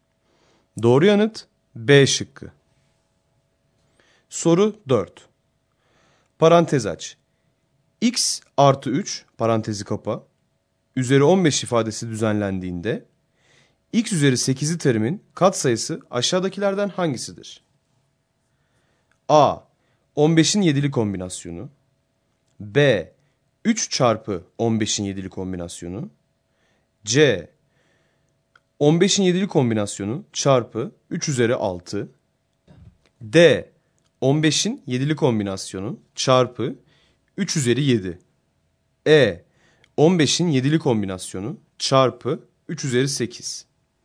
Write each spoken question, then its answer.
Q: Parantez aç, x artı 3 parantezi kapa, üzeri 15 ifadesi düzenlendiğinde x üzeri 8'li terimin katsayısı aşağıdakilerden hangisidir?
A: Doğru yanıt D şıkkı.